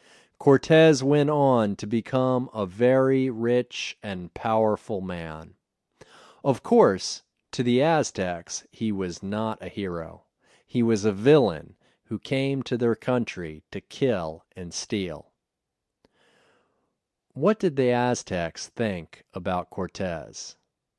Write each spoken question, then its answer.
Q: What did the Aztecs think about Cortez?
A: He was a villain who came to their country to kill and steal.